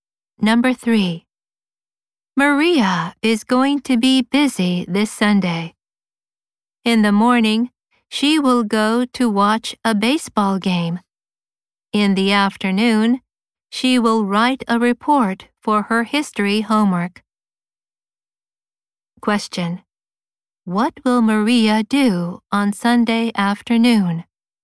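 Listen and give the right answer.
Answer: Write a report for her history homework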